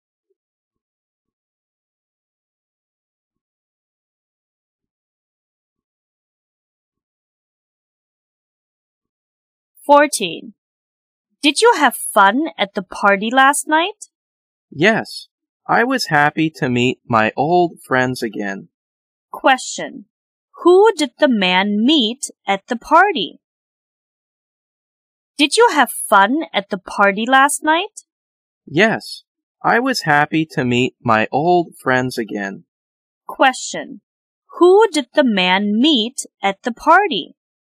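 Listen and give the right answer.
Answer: His old friends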